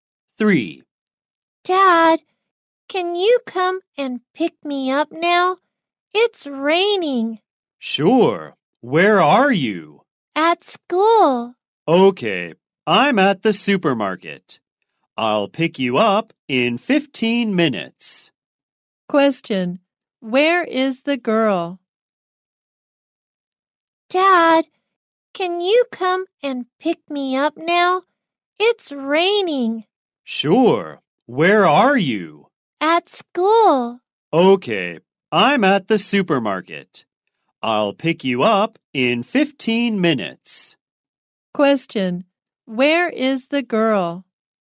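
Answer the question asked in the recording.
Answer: At school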